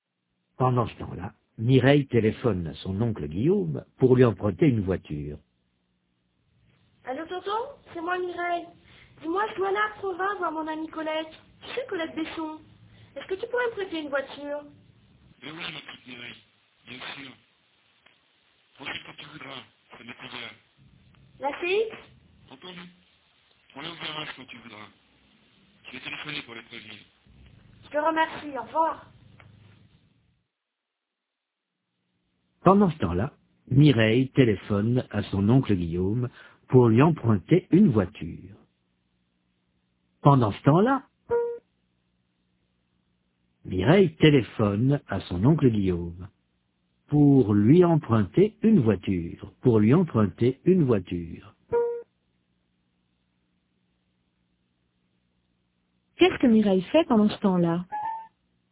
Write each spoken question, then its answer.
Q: Qu'est-ce que Mireille fait pendant ce temps-là?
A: Elle téléphone à son oncle Guillaume.